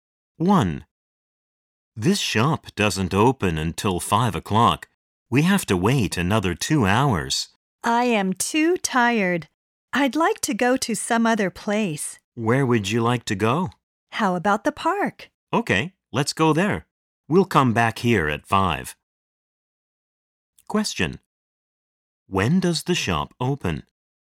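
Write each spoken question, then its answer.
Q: When does the shop open?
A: At 5 o'clock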